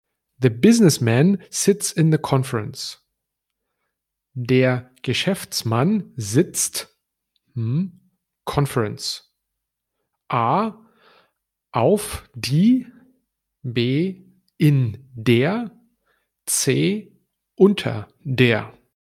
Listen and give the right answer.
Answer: And the right answer would be der Geschäftsmann sitzt in der Konferenz.